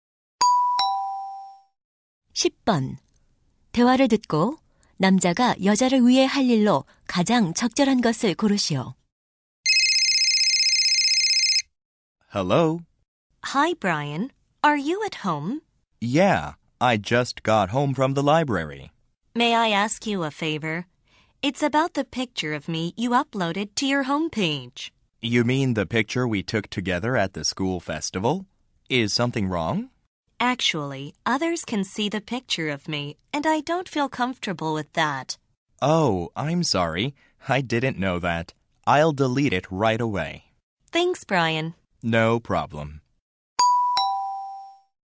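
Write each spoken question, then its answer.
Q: 대화를 듣고 남자가 여자를 위해 할 일로 가장 적절한 것을 고르시오.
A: 홈페이지에 올린 여자의 사진 삭제하기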